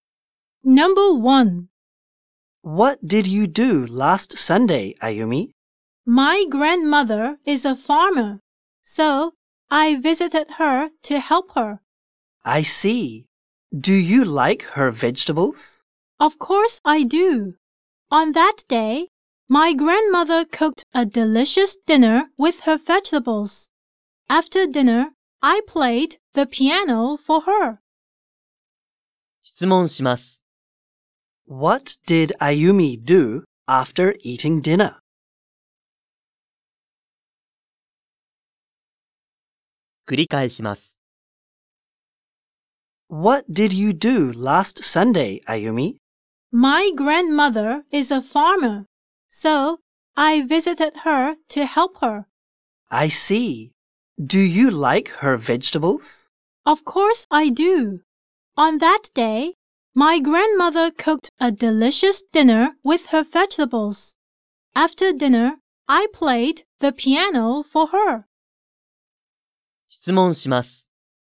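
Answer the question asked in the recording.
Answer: She played the piano for her grandmother.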